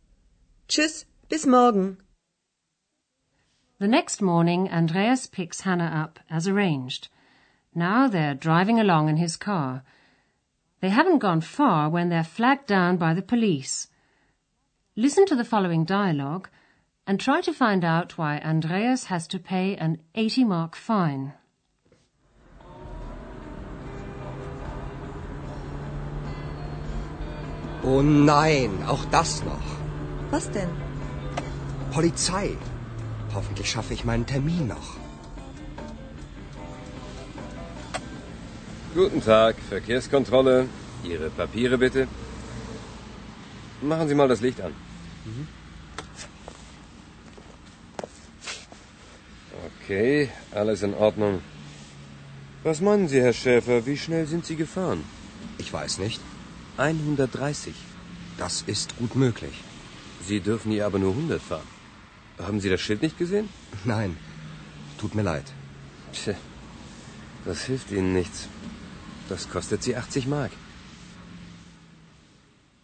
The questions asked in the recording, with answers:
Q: try to find out why Andreas has to pay an 80 mark fine.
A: Andreas has to pay an 80 mark fine because he was driving too fast.